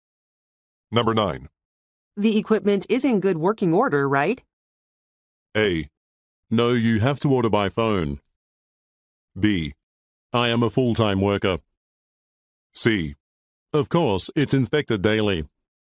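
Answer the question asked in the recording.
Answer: C: Of course, it's inspected daily.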